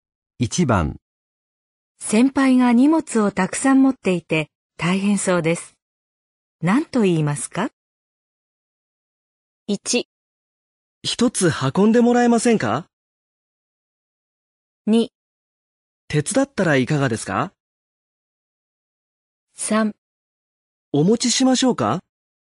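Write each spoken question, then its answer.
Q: 先輩が荷物をたくさん持っていて大変そうです。何と言いますか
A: 3: お持ちしましょうか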